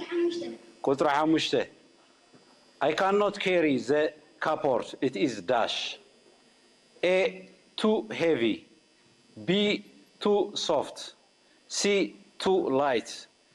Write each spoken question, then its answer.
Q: I cannot carry the cupboard. It is dash.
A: Too heavy.